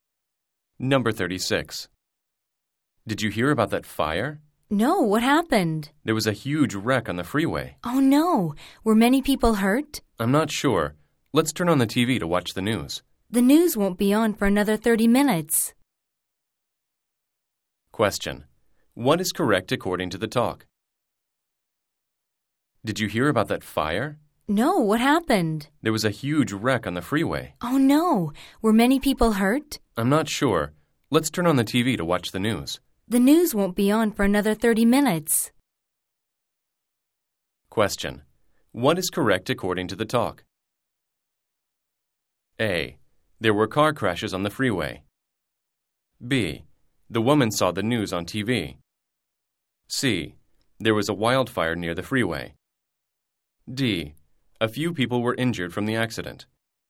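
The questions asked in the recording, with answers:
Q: What is correct according to the talk?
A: A: There were car crashes on the freeway.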